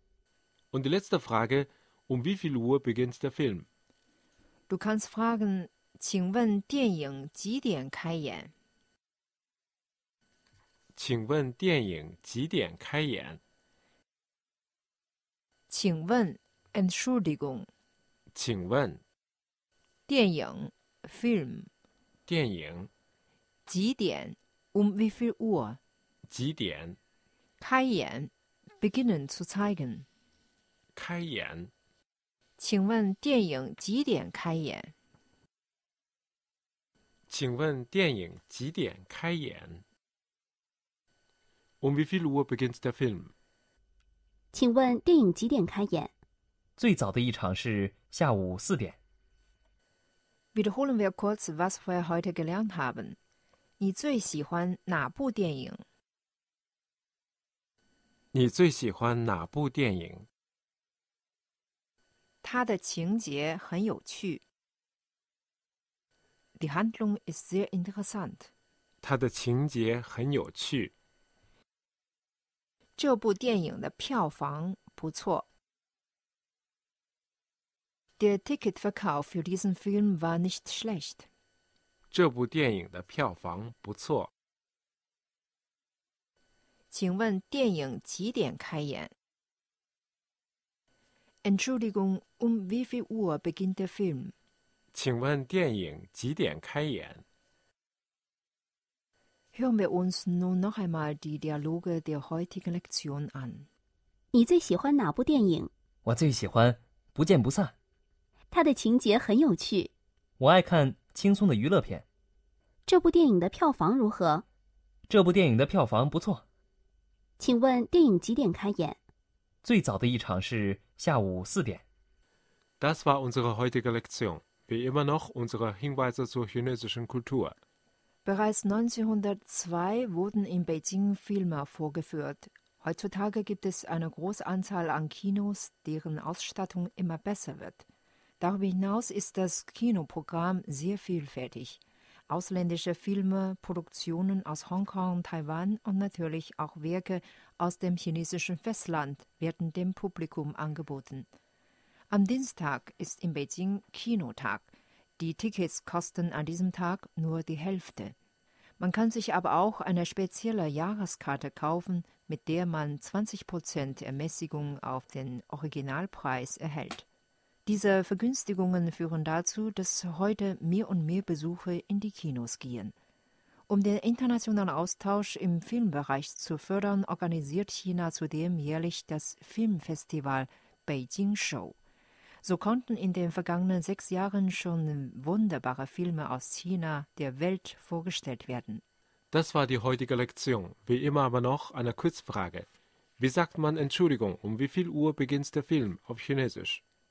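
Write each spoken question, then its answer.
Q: Wie sagt man Entschuldigung, wie viel Uhr beginnt der Film auf Chinesisch?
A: 请问电影几点开演?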